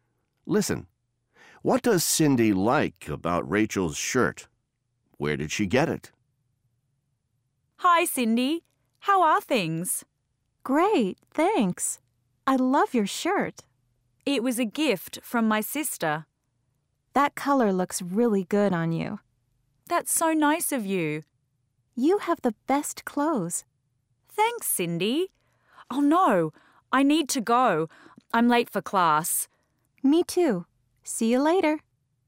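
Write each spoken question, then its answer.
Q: What does Cindy like about Rachel's shirt?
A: The color looks really good on her

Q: Where did she get it?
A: It was a gift from her sister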